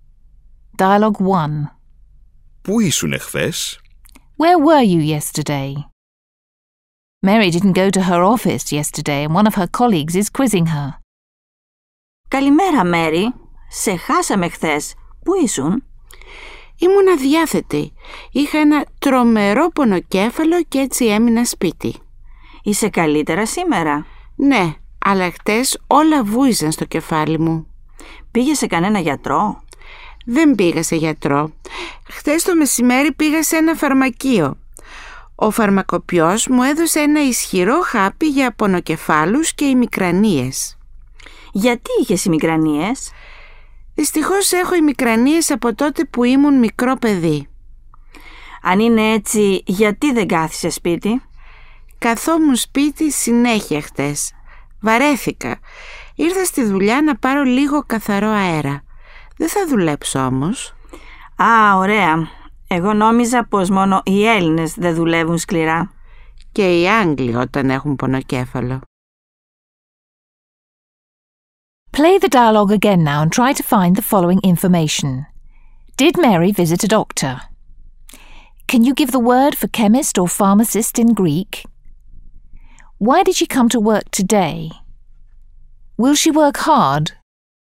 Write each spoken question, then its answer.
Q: Did Mary visit a doctor?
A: Mary did not visit the doctor yesterday.

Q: Can you give the word for chemist or pharmacist in Greek?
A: Pharmakopios is the Greek word for chemist or pharmacist.

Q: Why did she come to work today?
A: Mary said that she came to work today only to get some fresh air.

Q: Will she work hard?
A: She is not planning to work hard at all.